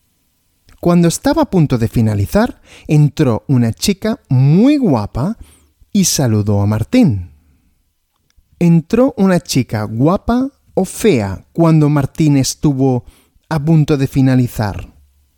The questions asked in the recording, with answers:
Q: ¿Entró una chica guapa o fea cuando Martín estuvo a punto de finalizar?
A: Una chica muy guapa.